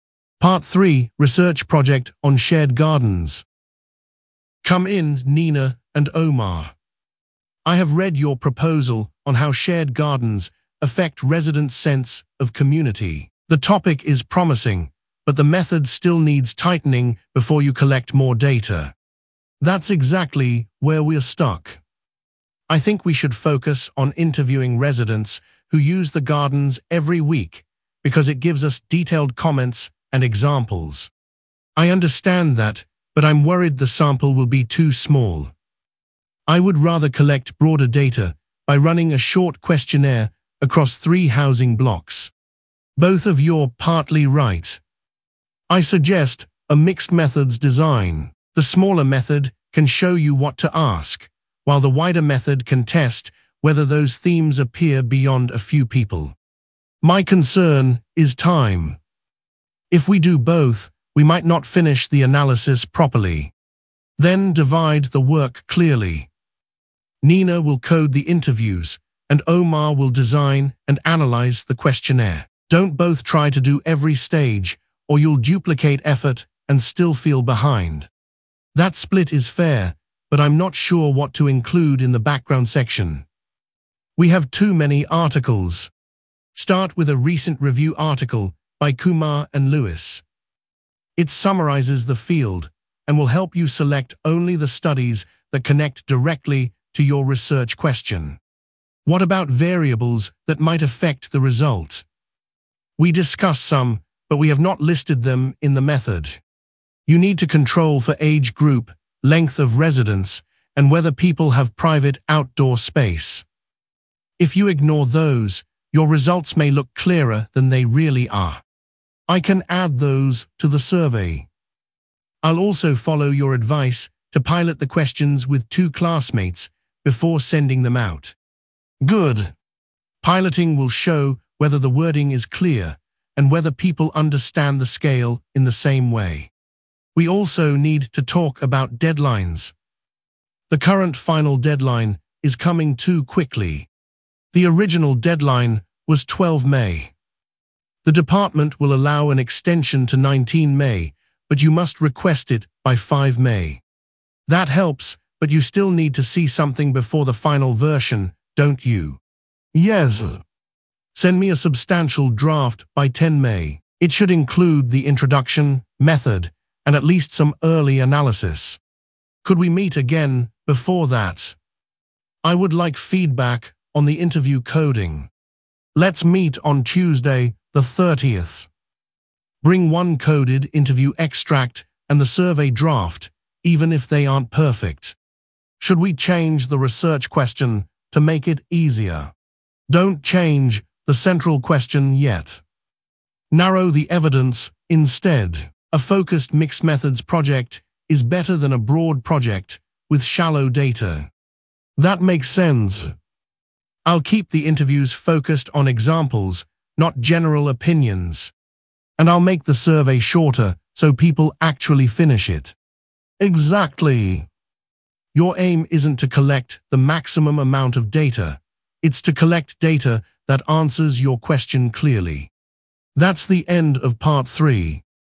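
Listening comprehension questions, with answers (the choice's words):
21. What is the students' project about?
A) museum opening hours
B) how shared gardens affect residents' sense of community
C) library seating plans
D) sports team performance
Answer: how shared gardens affect residents' sense of community

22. What method does Nina prefer?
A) running a short questionnaire across three housing blocks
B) a laboratory experiment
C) interviewing residents who use the gardens every week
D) an analysis of newspaper adverts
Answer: interviewing residents who use the gardens every week

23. What method does Omar prefer?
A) running a short questionnaire across three housing blocks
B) interviewing residents who use the gardens every week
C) a grammar test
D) a map drawing task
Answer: running a short questionnaire across three housing blocks

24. What does the tutor recommend?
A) using interviews only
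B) changing the topic completely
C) postponing data collection until next term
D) a mixed-methods design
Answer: a mixed-methods design

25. Which source does the tutor recommend for the background section?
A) an old newspaper column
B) a recent review article by Kumar and Lewis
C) the university prospectus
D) a student blog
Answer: a recent review article by Kumar and Lewis

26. Which controls should the students include?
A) room temperature only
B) the number of library books borrowed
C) age group, length of residence, and whether people have private outdoor space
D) the tutor's timetable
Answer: age group, length of residence, and whether people have private outdoor space

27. What will Nina do?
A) Nina will code the interviews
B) Omar will design and analyse the questionnaire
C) book the lecture theatre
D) write the final conclusion alone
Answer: Nina will code the interviews

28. What is the extended final deadline?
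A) 12 May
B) 5 May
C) 10 May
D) 19 May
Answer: 19 May

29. When must the students send a substantial draft?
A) Tuesday the 30th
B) 10 May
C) 5 May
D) 12 May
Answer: 10 May

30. What practical advice does the tutor give about the data collection tool?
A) make every question open-ended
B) avoid piloting anything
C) pilot the questions with two classmates before sending them out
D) collect as much data as possible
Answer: pilot the questions with two classmates before sending them out

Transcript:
Part 3: Research Project on Shared Gardens
Ellis: Come in, Nina and Omar. I have read your proposal on how shared gardens affect residents' sense of community. The topic is promising, but the method still needs tightening before you collect more data.
Nina: That is exactly where we are stuck. I think we should focus on interviewing residents who use the gardens every week because it gives us detailed comments and examples.
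Omar: I understand that, but I am worried the sample will be too small. I would rather collect broader data by running a short questionnaire across three housing blocks.
Ellis: Both of you are partly right. I suggest a mixed-methods design. The smaller method can show you what to ask, while the wider method can test whether those themes appear beyond a few people.
Nina: My concern is time. If we do both, we might not finish the analysis properly.
Ellis: Then divide the work clearly. Nina will code the interviews, and Omar will design and analyse the questionnaire. Do not both try to do every stage, or you will duplicate effort and still feel behind.
Omar: That split is fair, but I am not sure what to include in the background section. We have too many articles.
Ellis: Start with a recent review article by Kumar and Lewis. It summarises the field and will help you select only the studies that connect directly to your research question.
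Nina: What about variables that might affect the result? We discussed some, but we have not listed them in the method.
Ellis: You need to control for age group, length of residence, and whether people have private outdoor space. If you ignore those, your results may look clearer than they really are.
Omar: I can add those to the survey. I will also follow your advice to pilot the questions with two classmates before sending them out.
Ellis: Good. Piloting will show whether the wording is clear and whether people understand the scale in the same way.
Nina: We also need to talk about deadlines. The current final deadline is coming too quickly.
Ellis: The original deadline was 12 May. The department will allow an extension to 19 May, but you must request it by 5 May.
Omar: That helps, but you still need to see something before the final version, don't you?
Ellis: Yes. Send me a substantial draft by 10 May. 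It should include the introduction, method, and at least some early analysis.
Nina: Could we meet again before that? I would like feedback on the interview coding.
Ellis: Let's meet on Tuesday the 30th. Bring one coded interview extract and the survey draft, even if they are not perfect.
Omar: Should we change the research question to make it easier?
Ellis: Do not change the central question yet. Narrow the evidence instead. A focused mixed-methods project is better than a broad project with shallow data.
Nina: That makes sense. I will keep the interviews focused on examples, not general opinions.
Omar: And I will make the survey shorter so people actually finish it.
Ellis: Exactly. Your aim is not to collect the maximum amount of data; it is to collect data that answers your question clearly.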